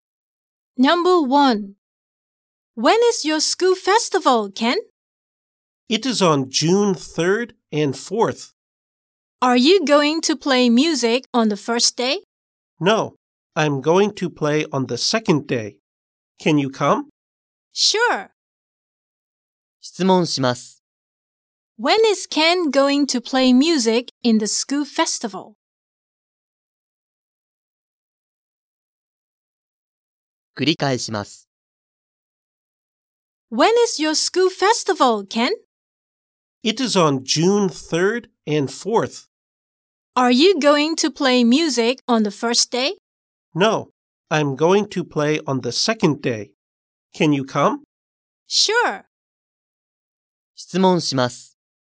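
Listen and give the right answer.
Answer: On June 4th (the second day)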